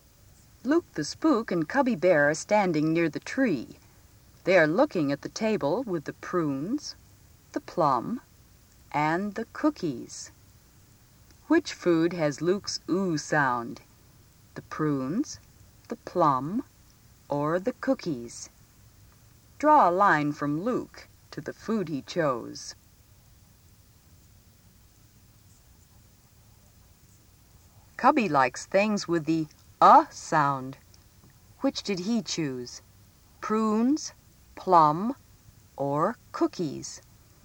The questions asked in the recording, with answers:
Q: Which food has Luke's ooh sound?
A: You were right if you gave Luke the prunes

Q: Which did he choose? Prunes, plum, or cookies?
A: Cubby the plum